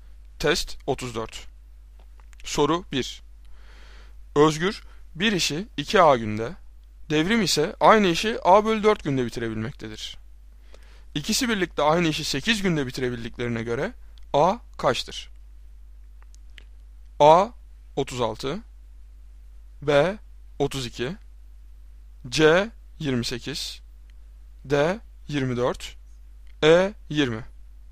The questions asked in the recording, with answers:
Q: İkisi birlikte aynı işi 8 günde bitirebildiklerine göre A kaçtır?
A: Doğru cevap A 36.